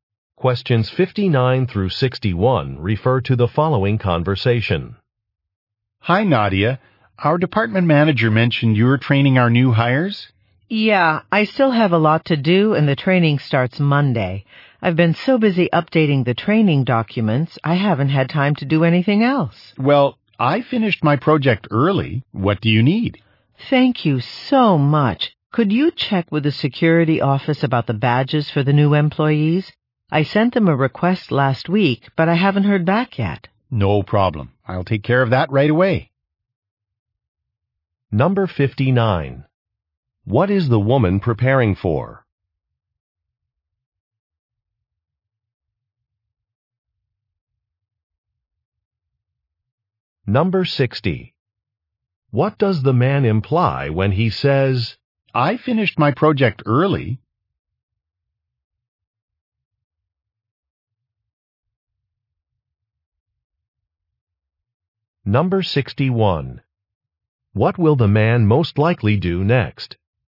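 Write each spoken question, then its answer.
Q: What is the woman preparing for?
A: Training new hires

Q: I finished my project early?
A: He is available to help

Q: What will the man most likely do next?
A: Contact the security office about badges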